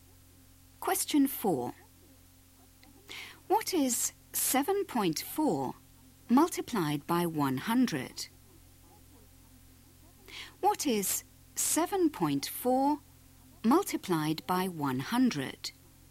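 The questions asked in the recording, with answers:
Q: What is 7.4 multiplied by 100?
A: 740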